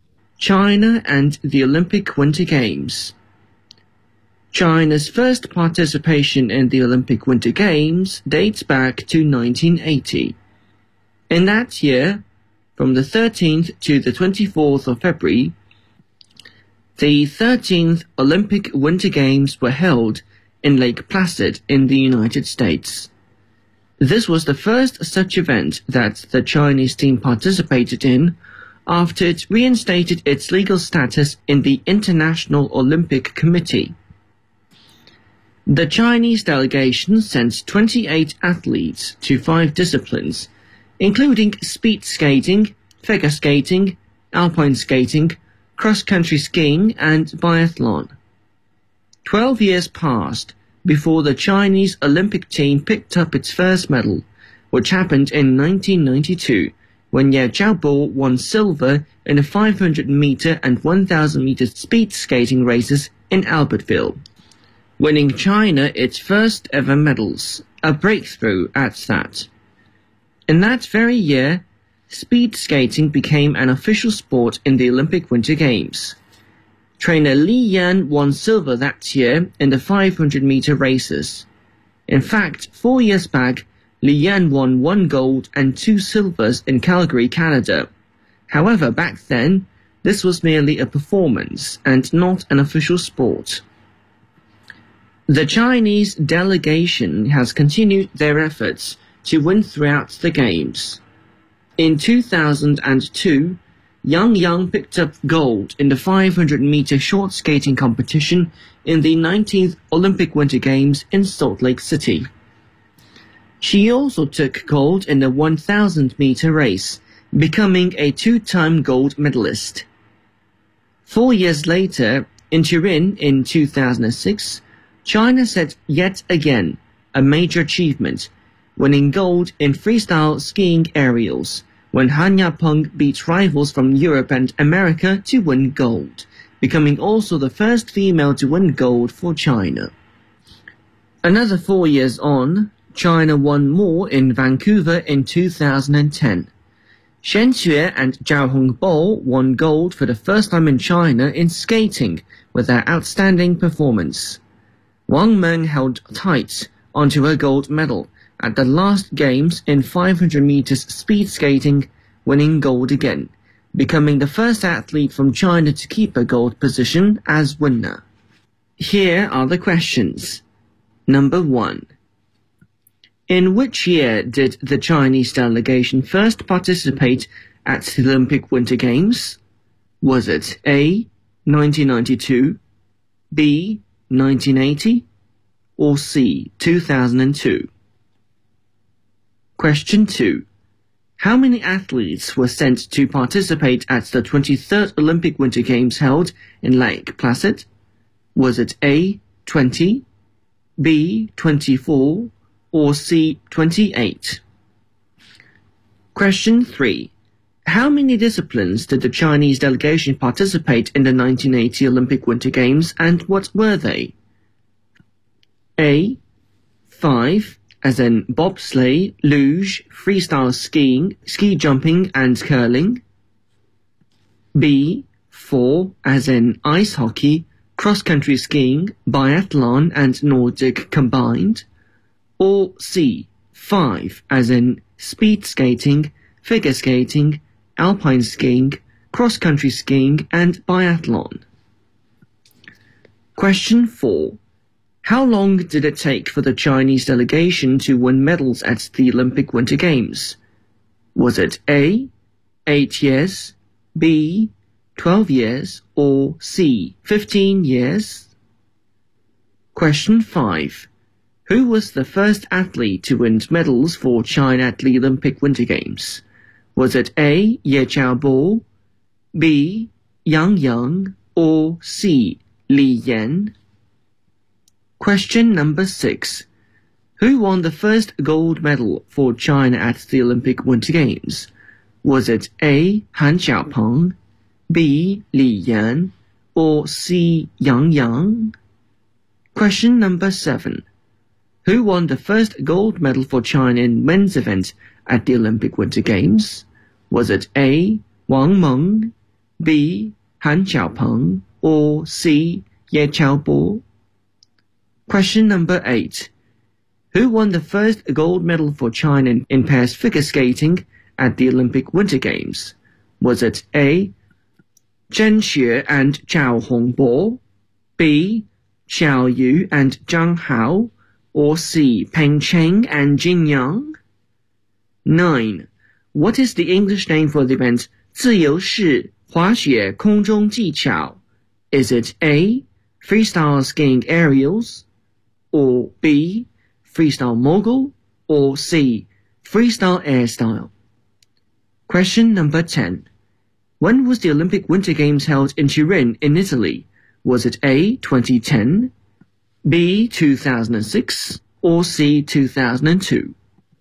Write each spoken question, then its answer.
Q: In which year did the Chinese delegation first participate at the Olympic Winter Games?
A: Question 1, B.

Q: How many athletes were sent to participate at the 23rd Olympic Winter Games held in Lake Placid?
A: Question 2, C.

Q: How many disciplines did the Chinese delegation participate in the 1980 Olympic Winter Games and what were they?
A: Question 3, C.

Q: How long did it take for the Chinese delegation to win medals at the Olympic Winter Games?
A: Question 4, B.

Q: Who was the first athlete to win medals for China at the Olympic Winter Games?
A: Question 5, A.

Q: Who won the first gold medal for China at the Olympic Winter Games?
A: Question 6, C.

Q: Who won the first gold medal for China in men's event at the Olympic Winter Games?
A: Question 7, B.

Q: Who won the first gold medal for China in pairs figure skating at the Olympic Winter Games?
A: Question 8, A.

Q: What is the English name for the event 自由式 滑雪 空中技巧?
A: Question 9, A.

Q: When was the Olympic Winter Games held in Turin in Italy?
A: Question 10, B.